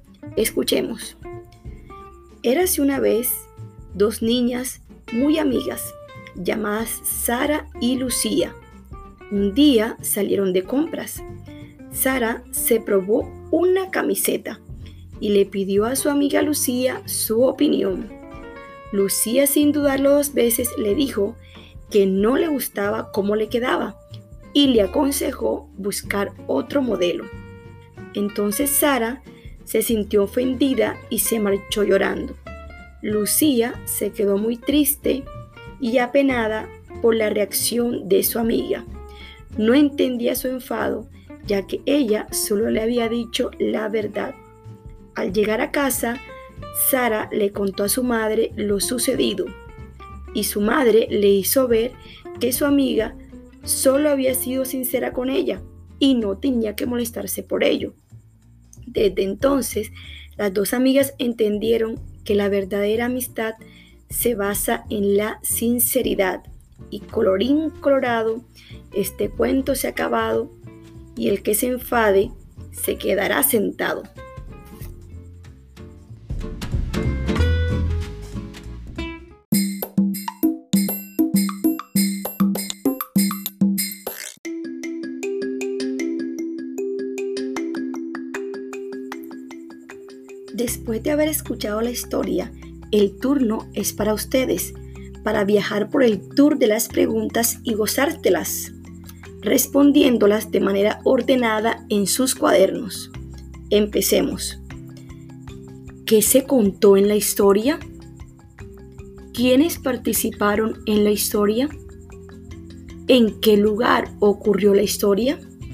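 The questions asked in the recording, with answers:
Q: ¿Quiénes participaron en la historia?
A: Sara y Lucía (y la madre de Sara)

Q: ¿En qué lugar ocurrió la historia?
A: En una tienda, de compras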